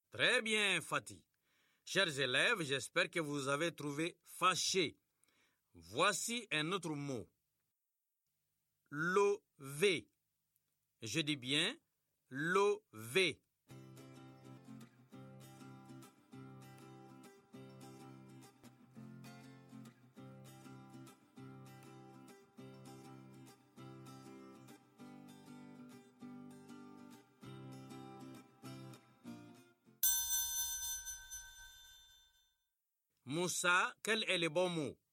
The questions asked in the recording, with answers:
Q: Moussa, quel est le bon mot?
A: Vélo, monsieur.